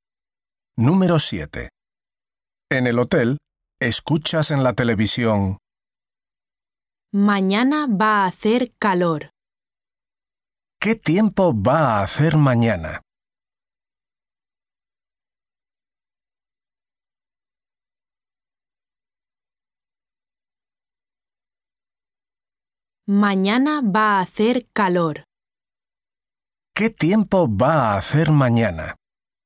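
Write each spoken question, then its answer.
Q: ¿Qué tiempo va a hacer mañana?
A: Va a hacer calor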